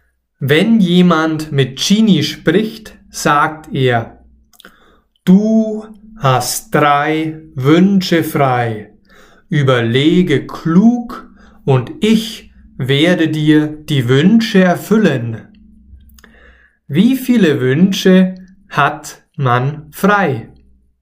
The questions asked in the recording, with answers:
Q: Wie viele Wünsche hat man frei?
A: Drei man hat drei Wünsche frei.